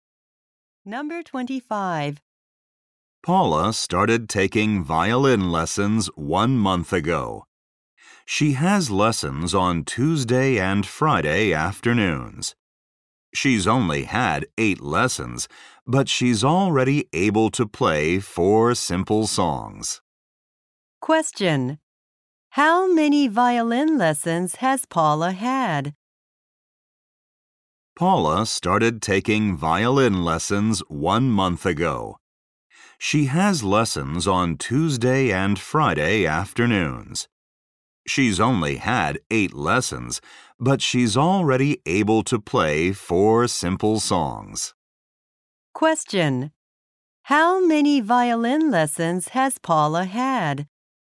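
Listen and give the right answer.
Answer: Eight.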